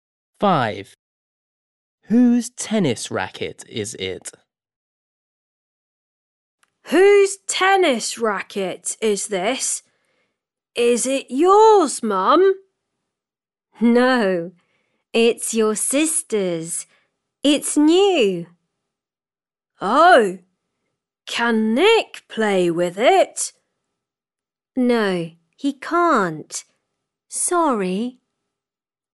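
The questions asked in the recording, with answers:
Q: Whose tennis racket is it?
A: his sister's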